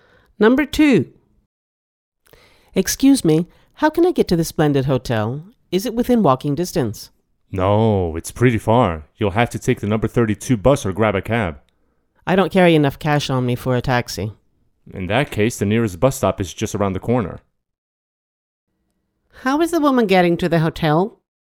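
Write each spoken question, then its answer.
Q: How is the woman getting to the hotel?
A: By bus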